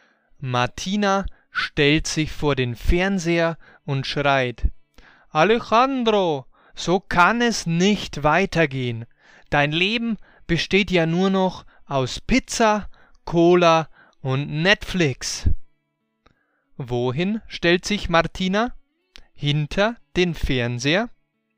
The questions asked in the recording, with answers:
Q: Wohin stellt sich Martina?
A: Sie stellt sich vor den Fernseher.